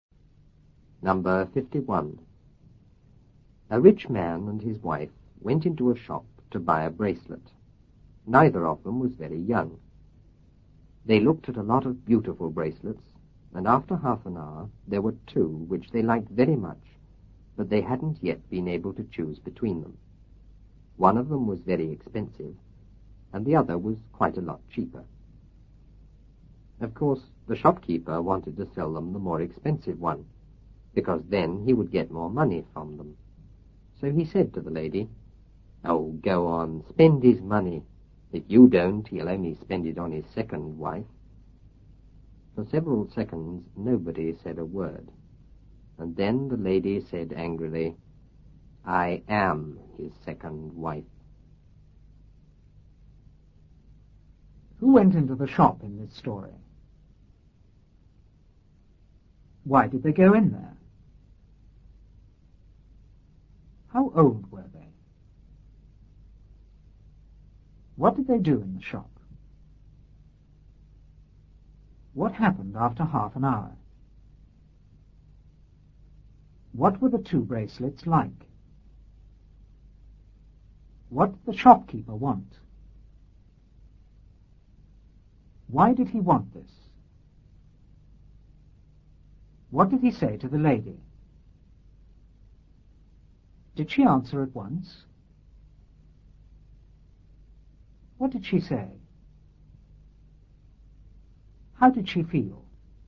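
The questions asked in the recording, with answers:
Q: Who went into the shop in this story?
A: A rich man and his wife

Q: Why did they go in there?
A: To buy a bracelet

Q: How old were they?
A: Neither of them was very young

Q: What did they do in the shop?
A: They looked at a lot of beautiful bracelets

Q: What happened after half an hour?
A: There were two they liked very much but couldn't choose between

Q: What were the two bracelets like?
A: One was very expensive, the other quite a lot cheaper

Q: What did the shopkeeper want?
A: To sell them the more expensive one

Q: Why did he want this?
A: Because he would get more money from them

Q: What did he say to the lady?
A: Go on, spend his money, or he'll only spend it on his second wife

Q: Did she answer at once?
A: No, nobody said a word for several seconds

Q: What did she say?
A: I am his second wife

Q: How did she feel?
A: Angry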